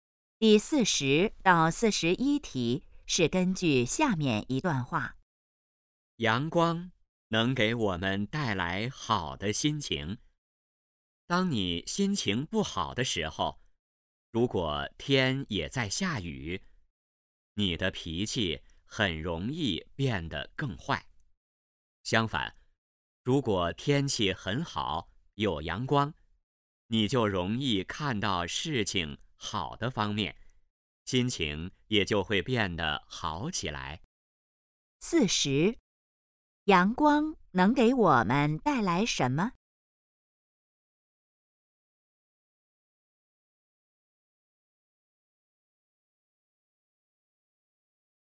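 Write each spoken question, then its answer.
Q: 阳光能给我们带来什么?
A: 好的心情

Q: 这段话主要谈什么?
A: 阳光对心情的影响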